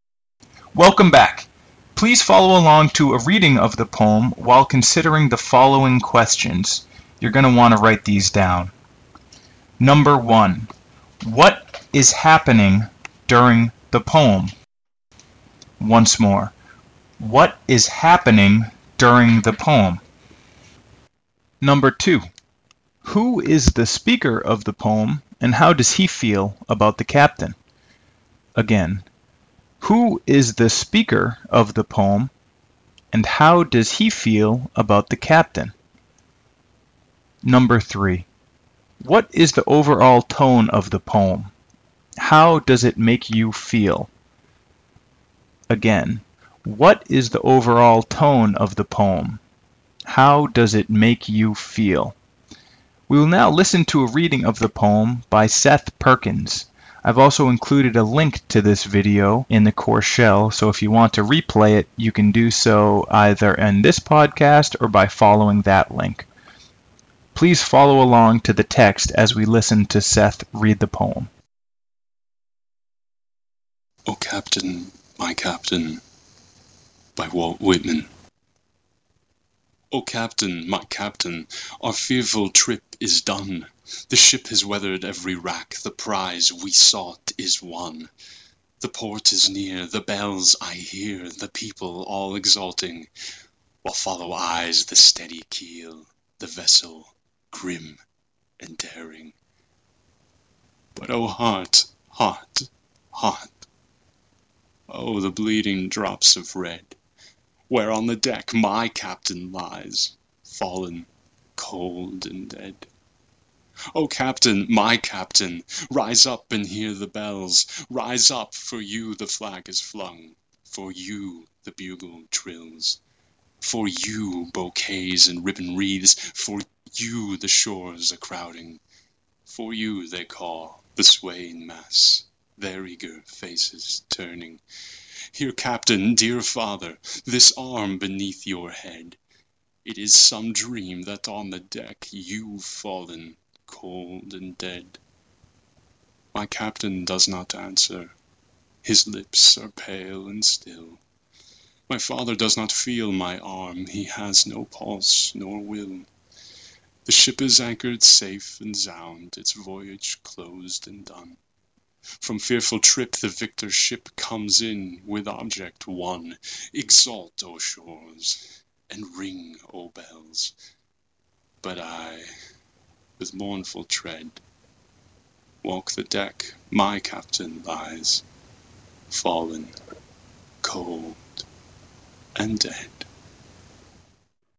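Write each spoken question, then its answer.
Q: what is happening during the poem?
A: The ship comes home safely after a fearful trip and the people celebrate, but the captain lies dead on the deck.

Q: who is the speaker of the poem and how does he feel about the captain?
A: A sailor on the ship who loves the captain like a father and grieves his death.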